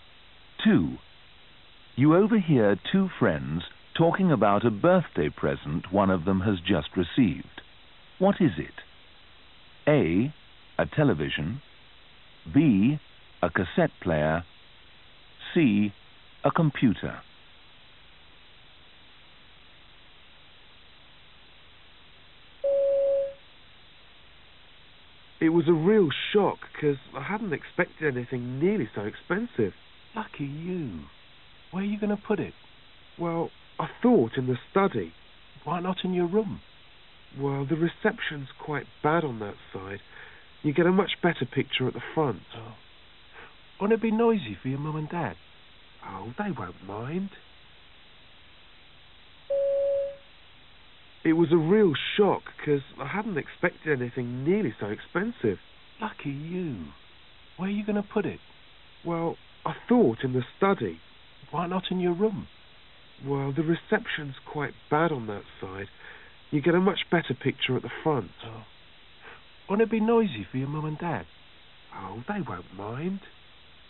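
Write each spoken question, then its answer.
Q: What is it?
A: A: A television.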